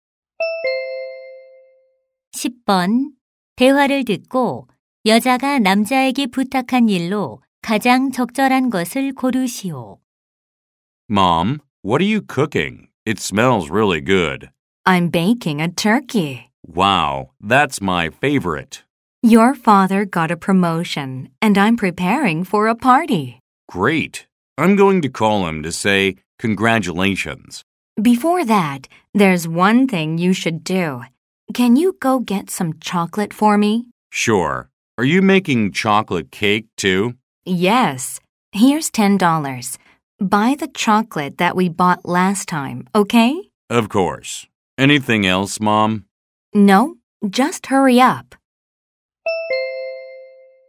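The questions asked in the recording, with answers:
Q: 대화를 듣고 여자가 남자에게 부탁한 일로 가장 적절한 것을 고르시오.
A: 초콜릿 사 오기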